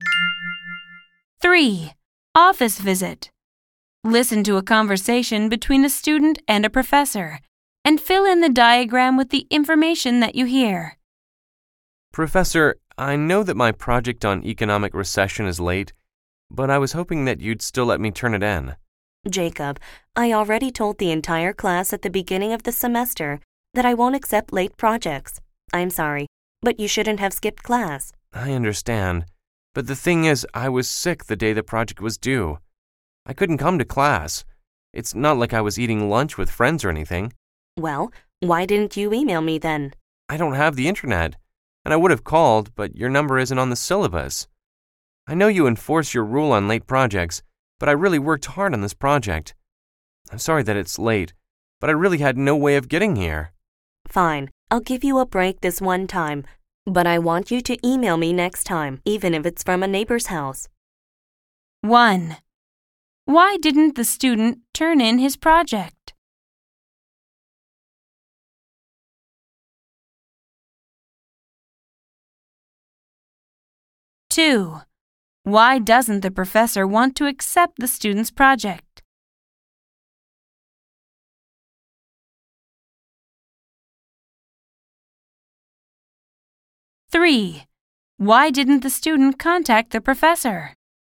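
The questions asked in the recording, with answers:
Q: Why didn't the student turn in his project?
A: He was sick the day it was due and couldn't come to class.

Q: Why doesn't the professor want to accept the student's project?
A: She told the class she won't accept late projects.

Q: Why didn't the student contact the professor?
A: He has no internet and her number isn't on the syllabus.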